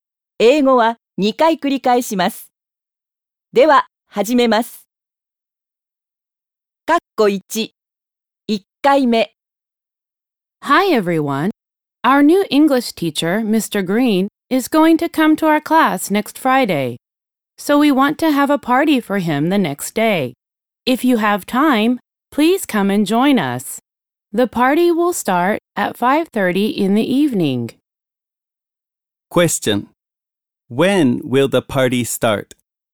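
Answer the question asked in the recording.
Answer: At 5:30 in the evening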